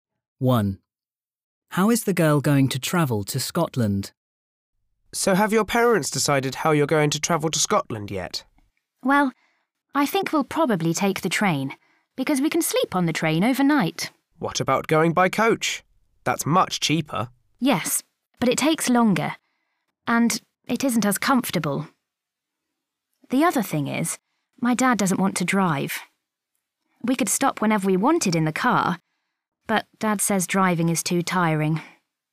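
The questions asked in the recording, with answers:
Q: How is the girl going to travel to Scotland?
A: By train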